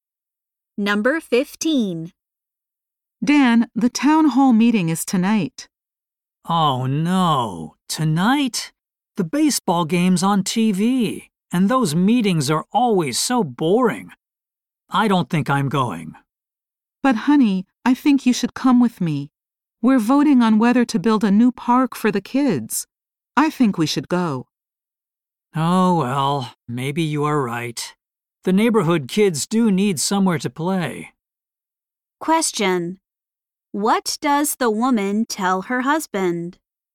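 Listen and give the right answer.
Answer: He should come to the town hall meeting, where they will vote on a new park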